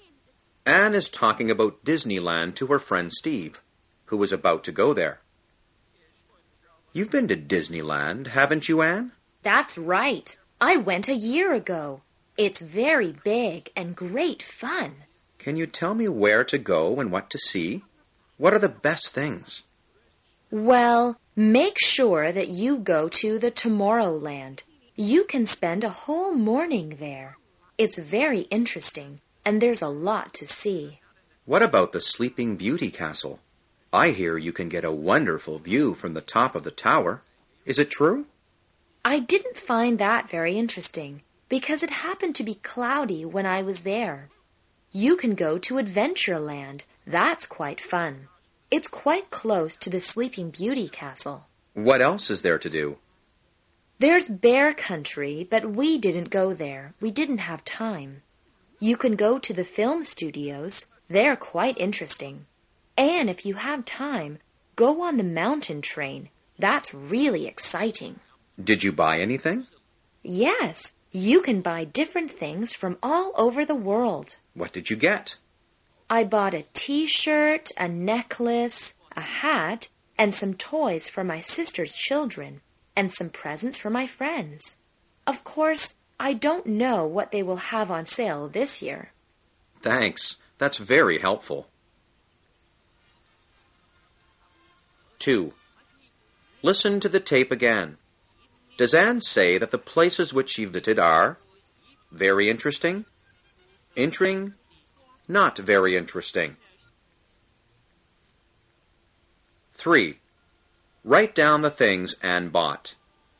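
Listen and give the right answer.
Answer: A T-shirt, a necklace, a hat, some toys for her sister's children, and some presents for her friends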